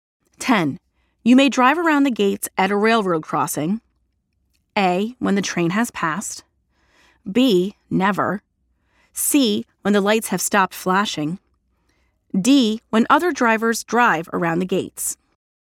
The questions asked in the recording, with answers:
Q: You may drive around the gates at a railroad crossing.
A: The answer is letter B. Never drive around the gates at a railroad crossing.